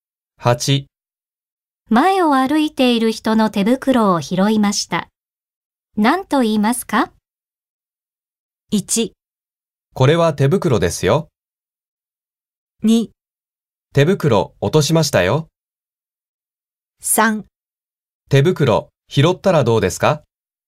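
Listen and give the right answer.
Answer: 2: 手袋落としましたよ。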